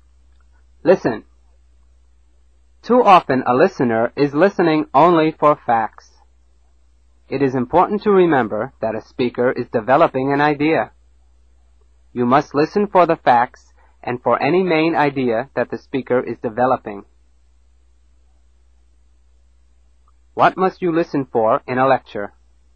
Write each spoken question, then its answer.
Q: What must you listen for in a lecture?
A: For facts and main ideas.